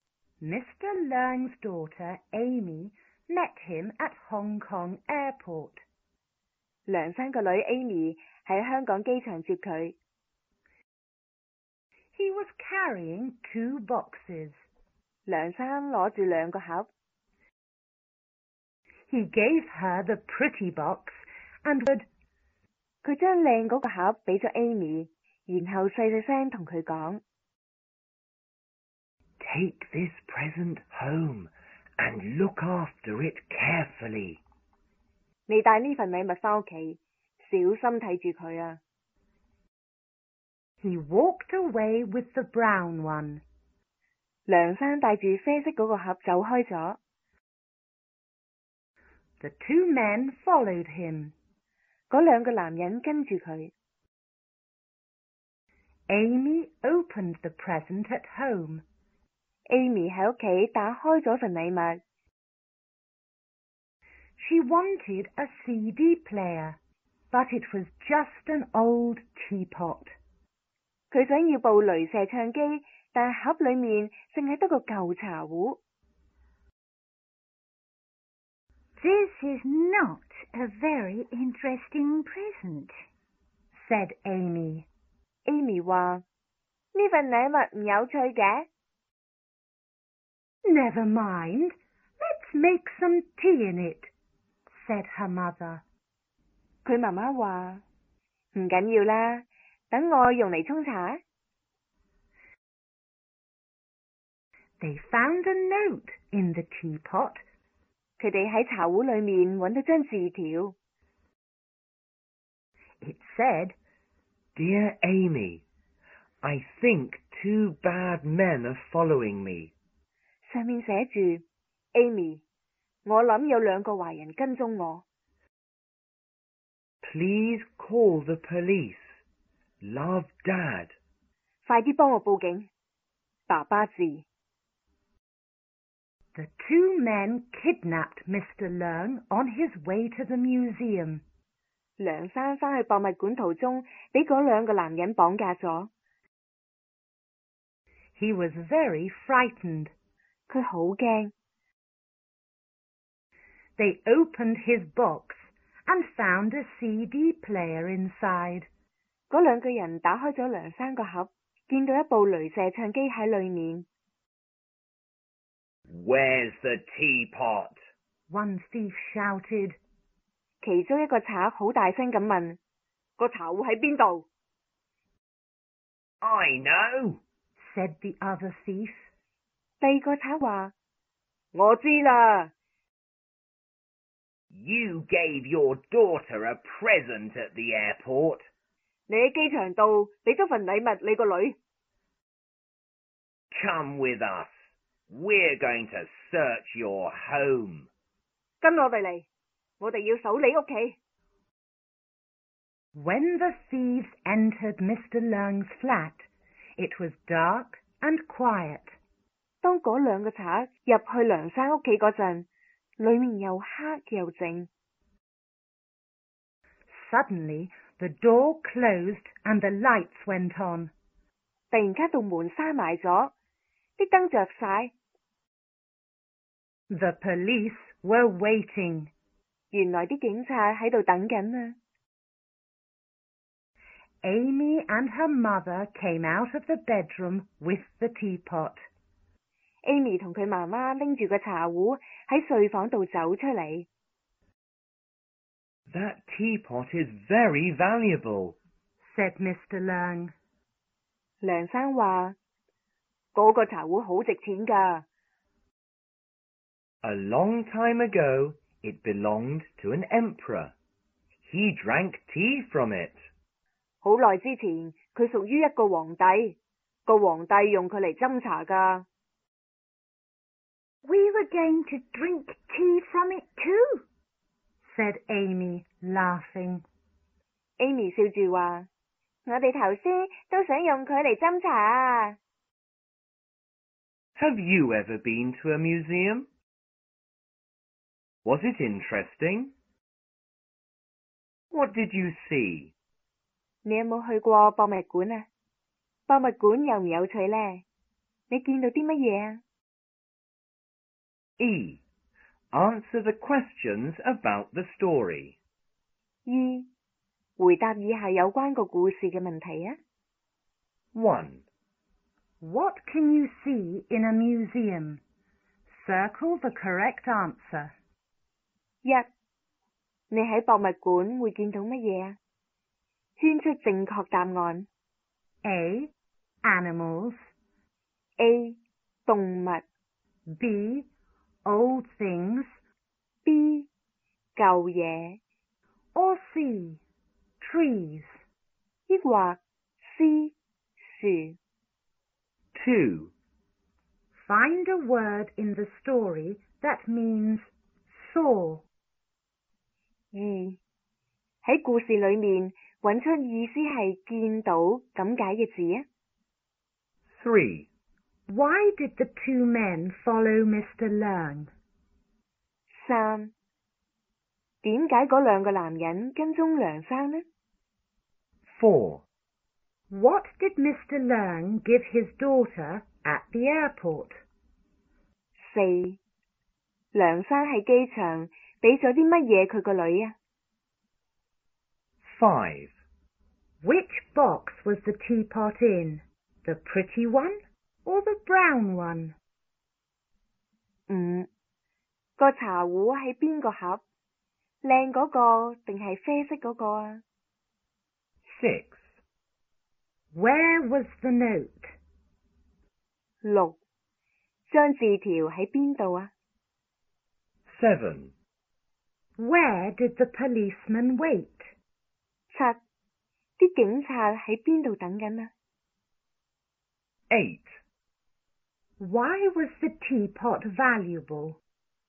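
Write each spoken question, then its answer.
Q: What can you see in a museum?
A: B: Old things.

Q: Why did the two men follow Mr. Leung?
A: They wanted the valuable teapot.

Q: What did Mr. Leung give his daughter at the airport?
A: The pretty box (a present with the teapot)

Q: Which box was the teapot in? The pretty one or the brown one?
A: The pretty one

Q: Where was the note?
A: In the teapot

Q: Where did the policeman wait?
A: In Mr. Leung's flat

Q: Why was the teapot valuable?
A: It belonged to an emperor long ago.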